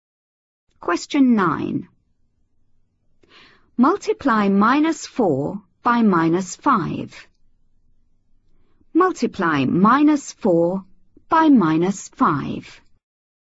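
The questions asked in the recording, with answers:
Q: Multiply minus 4 by minus 5.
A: 20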